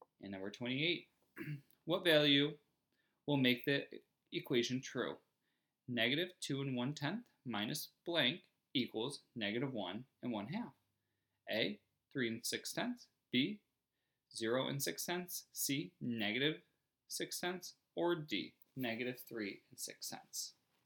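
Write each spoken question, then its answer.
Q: what value will make the equation true?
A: C: negative 6/10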